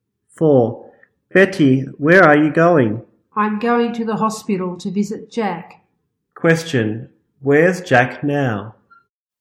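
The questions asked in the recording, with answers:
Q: where's Jack now?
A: In the hospital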